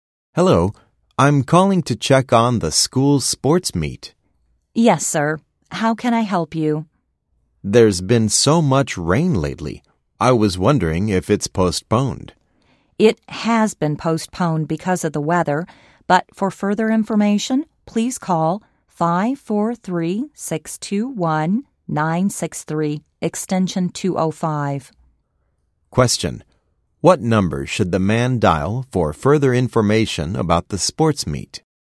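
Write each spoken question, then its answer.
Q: What number should the man dial for further information about the sports meet?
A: 543-621-963, extension 205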